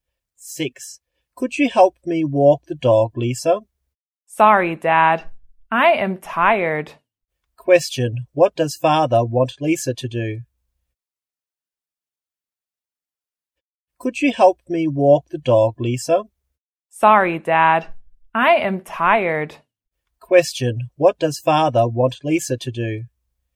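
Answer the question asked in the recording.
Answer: Walk the dog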